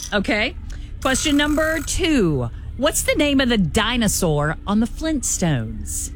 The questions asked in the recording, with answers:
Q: What's the name of the dinosaur on the Flintstones?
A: Dino.